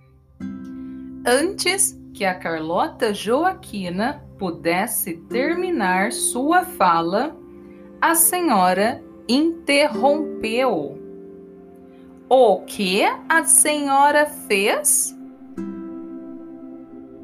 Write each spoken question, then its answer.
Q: O que a senhora fez?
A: A senhora interrompeu e disse: Ó, oh, minha querida Carlota Joaquina, quanto tempo!